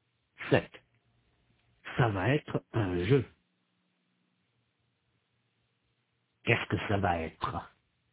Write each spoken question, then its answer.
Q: Qu'est-ce que ça va être?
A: Un jeu. Ça va être un jeu.